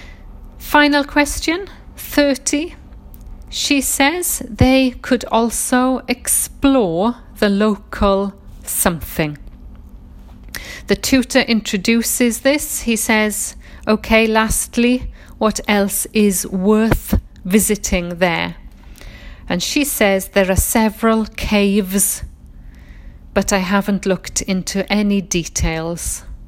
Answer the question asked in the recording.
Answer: And it's quite a tricky word, caves, C-A-V-E, and it's plural, S.